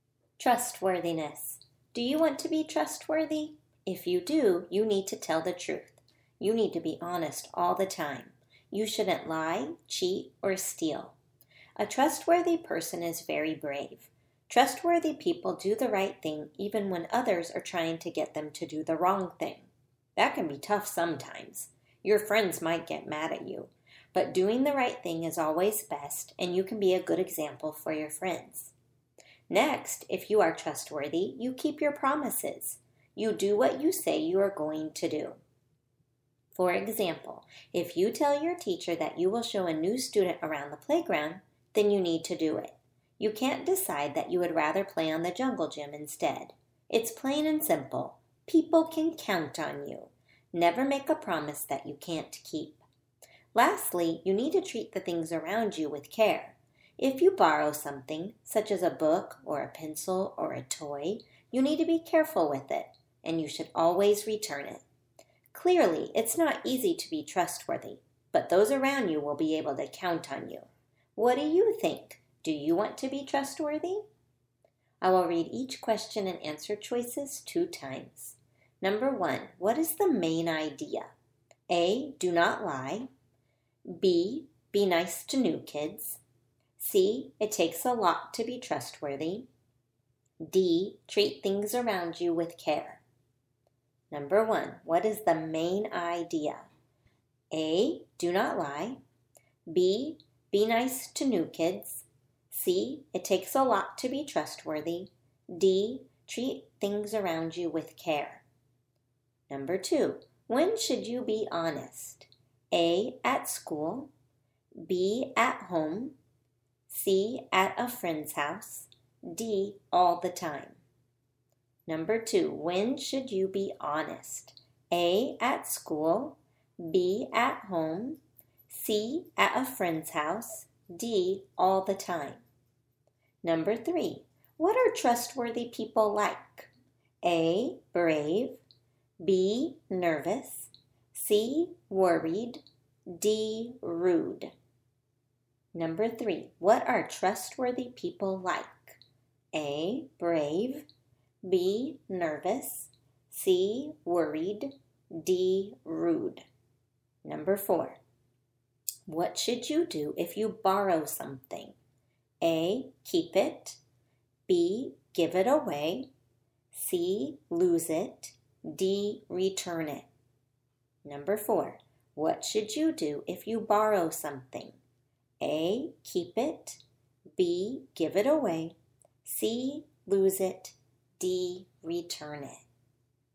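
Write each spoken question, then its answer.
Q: what is the main idea?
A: C: it takes a lot to be trustworthy

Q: when should you be honest?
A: D: all the time

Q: what are trustworthy people like?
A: A: brave

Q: what should you do if you borrow something?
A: D: return it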